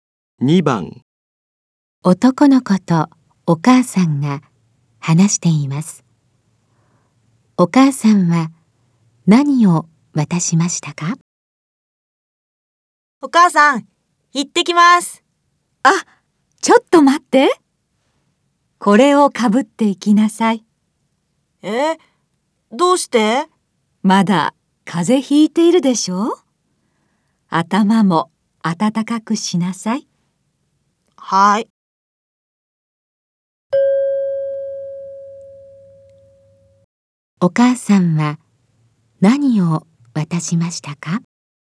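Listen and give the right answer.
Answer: 帽子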